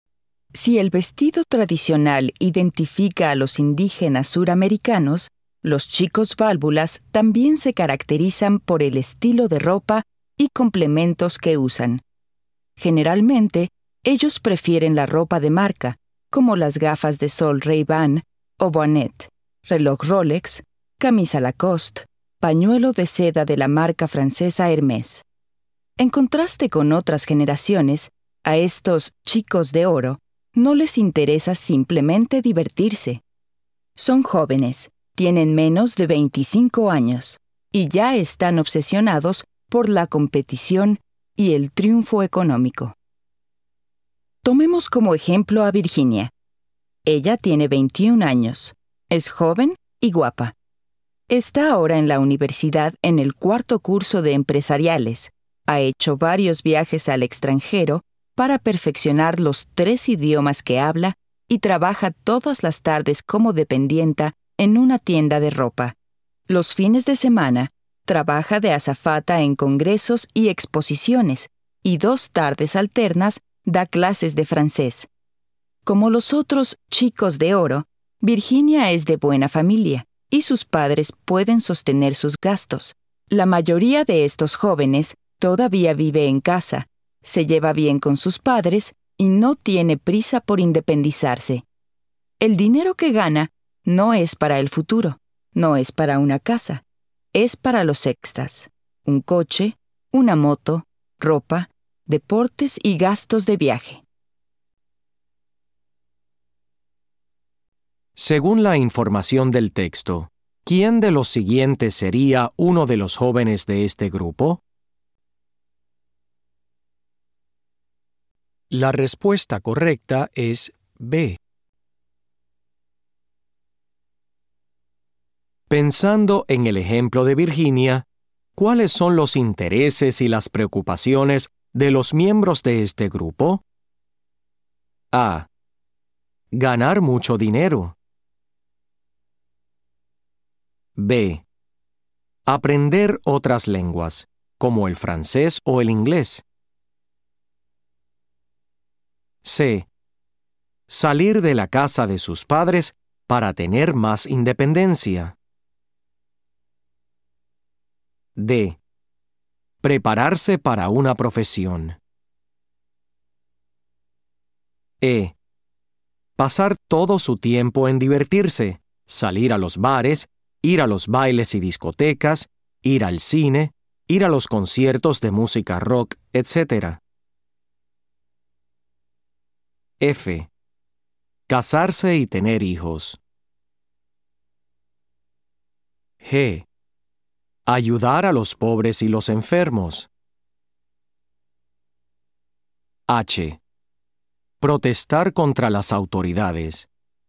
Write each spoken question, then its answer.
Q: Pensando en el ejemplo de Virginia, ¿cuáles son los intereses y las preocupaciones de los miembros de este grupo?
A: Las respuestas correctas son A. Sí. B. Sí. C. No. D. Sí. E. No. F. No. G. No. H. No.